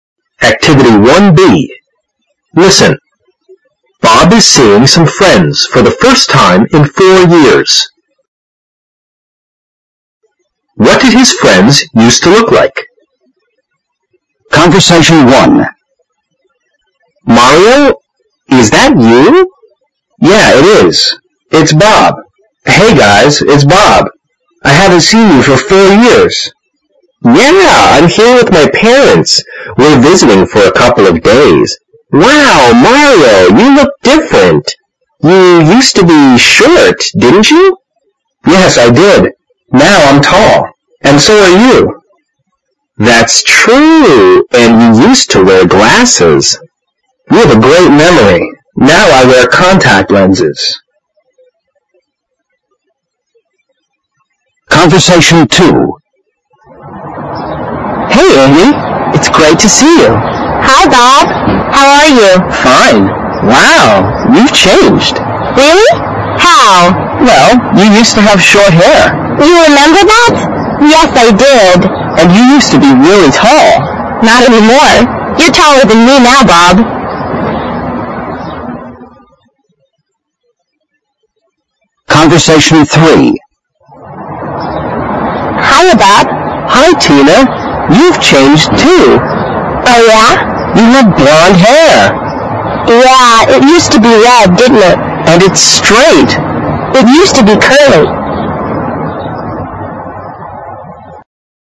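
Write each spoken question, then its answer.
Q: What did his friends used to look like?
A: Mario used to be short and wear glasses; Andy used to have short hair and be really tall; Tina used to have red, curly hair.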